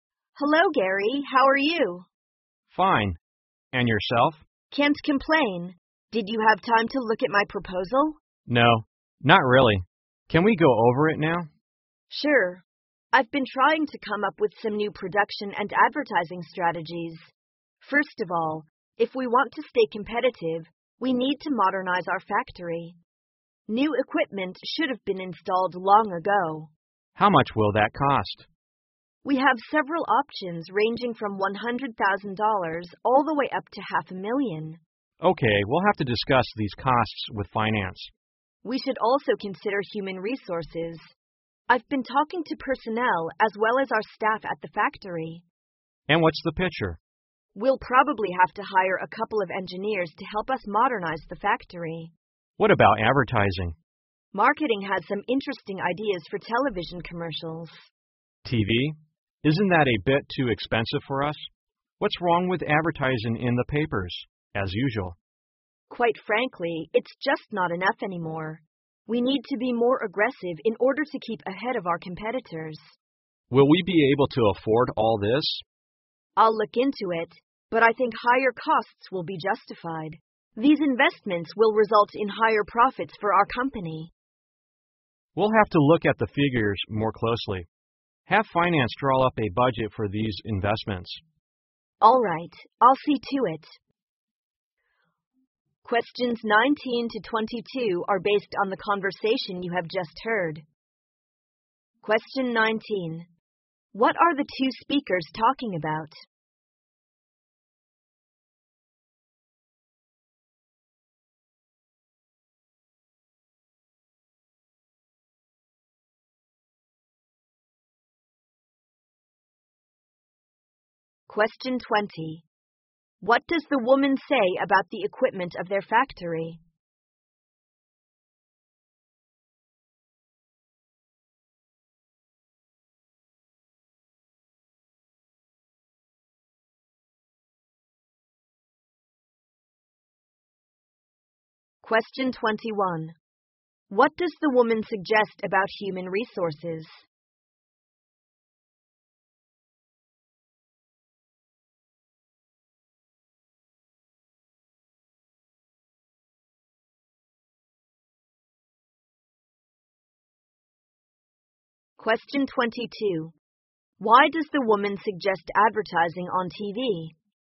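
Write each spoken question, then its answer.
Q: What are the two speakers talking about?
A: The woman's proposal for new production and advertising strategies

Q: What does the woman say about the equipment of their factory?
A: It should have been replaced/modernized long ago

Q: What does the woman suggest about human resources?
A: Hire a couple of engineers to help modernize the factory

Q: Why does the woman suggest advertising on TV?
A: To be more aggressive and keep ahead of competitors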